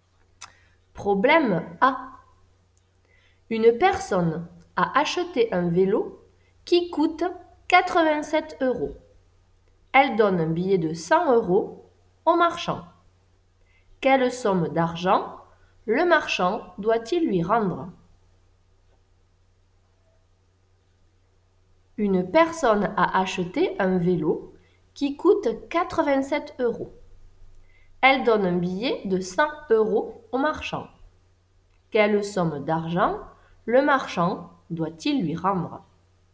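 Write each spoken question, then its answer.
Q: Quelle somme d'argent le marchand doit-il lui rendre?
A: 13 euros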